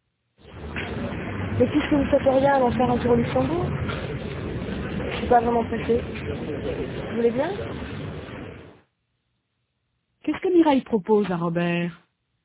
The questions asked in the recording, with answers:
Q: Qu'est-ce que Mireille propose à Robert?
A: D'aller faire un tour au Luxembourg.